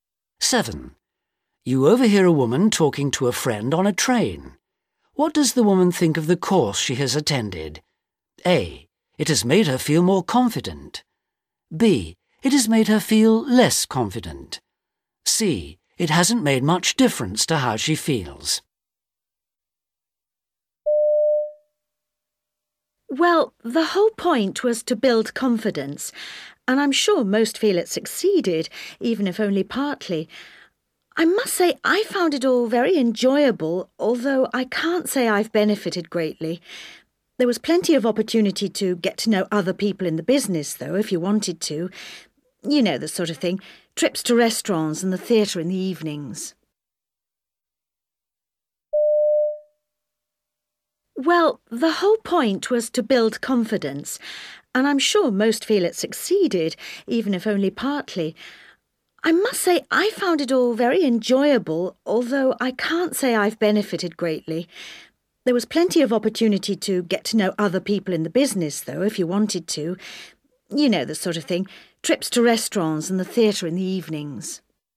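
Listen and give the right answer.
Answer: C: It hasn't made much difference to how she feels.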